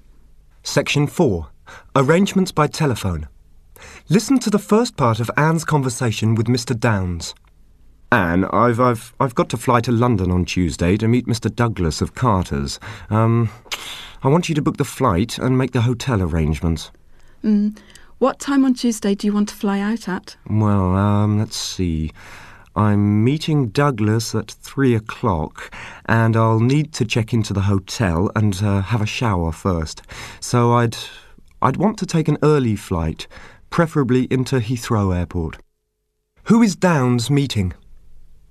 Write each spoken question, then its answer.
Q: Who is Downes meeting?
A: Mr. Douglas of Carter's.